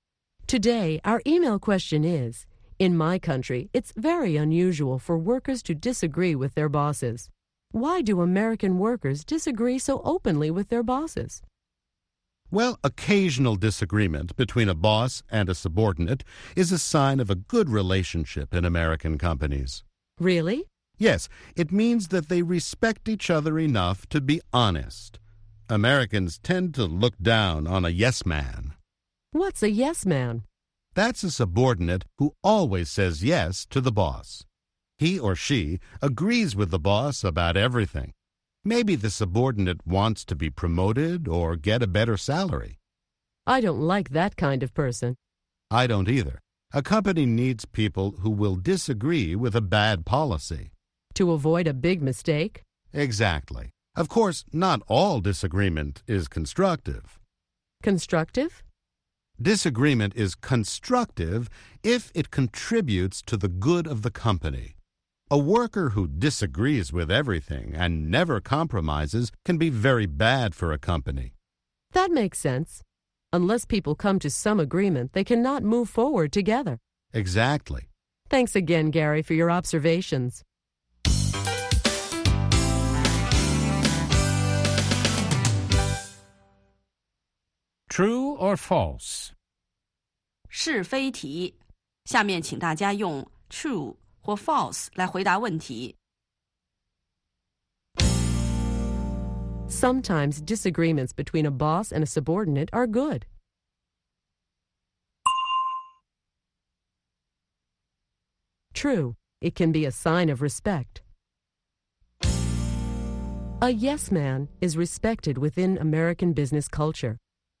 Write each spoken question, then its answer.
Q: A yes man is respected within American business culture.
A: False.Americans tend to look down on someone who always agrees with his or her boss.